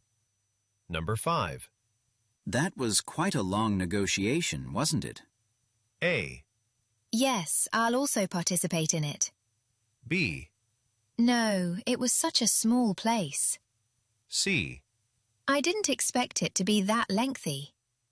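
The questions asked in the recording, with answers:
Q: That was quite a long negotiation, wasn't it?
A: C: I didn't expect it to be that lengthy.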